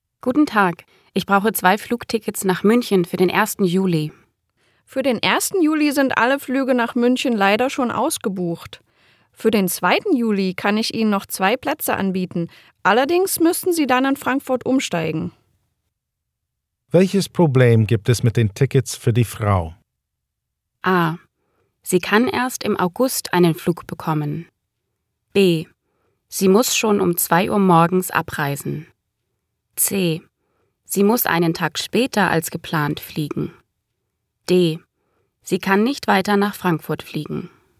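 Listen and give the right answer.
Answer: C: Sie muss einen Tag später als geplant fliegen.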